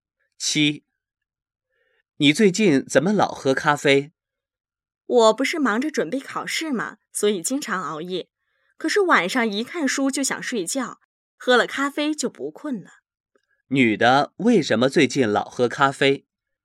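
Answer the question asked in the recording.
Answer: 她忙着准备考试,经常熬夜,喝了咖啡就不困了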